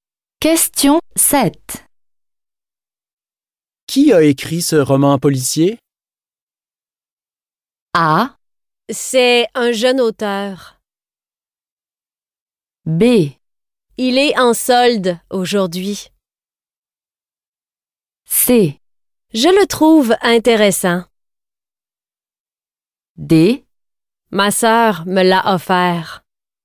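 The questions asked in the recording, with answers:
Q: Qui a écrit ce roman policier?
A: A: C'est un jeune auteur.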